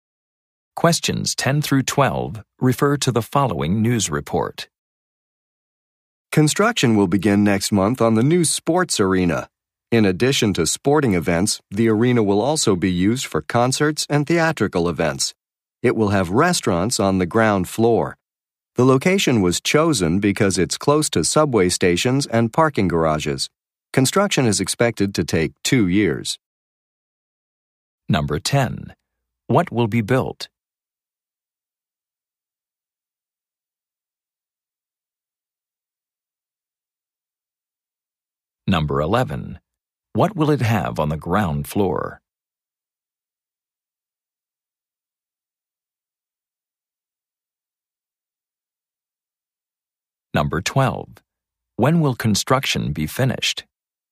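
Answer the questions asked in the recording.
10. A sports arena
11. Restaurants
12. In about 2 years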